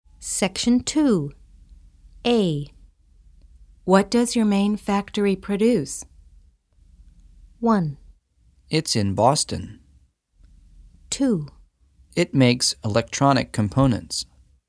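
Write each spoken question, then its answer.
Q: What does your main factory produce?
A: 2: It makes electronic components.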